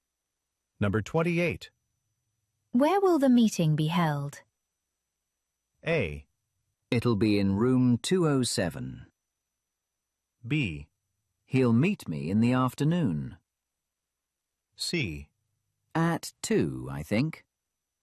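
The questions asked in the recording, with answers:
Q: Where will the meeting be held?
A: A: It'll be in room 207.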